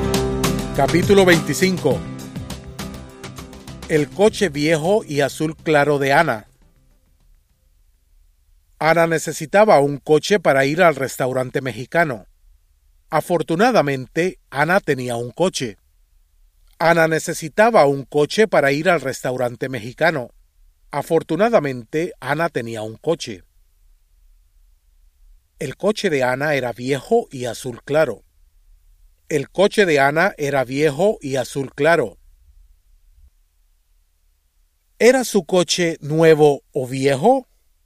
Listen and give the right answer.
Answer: Su coche era viejo.